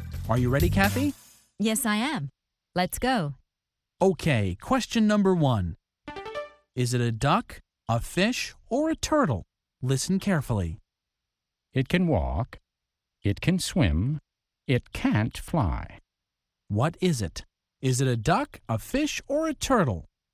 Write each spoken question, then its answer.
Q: What is it? Is it a duck, a fish, or a turtle?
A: It's a turtle. A turtle can walk and swim, but it can't fly.